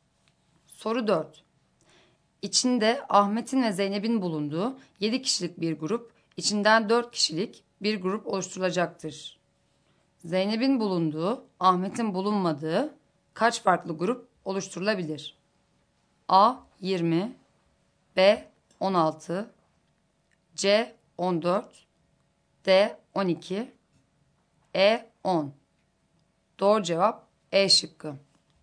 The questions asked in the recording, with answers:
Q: Zeynep'in bulunduğu, Ahmet'in bulunmadığı kaç farklı grup oluşturulabilir?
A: Doğru cevap E şıkkı.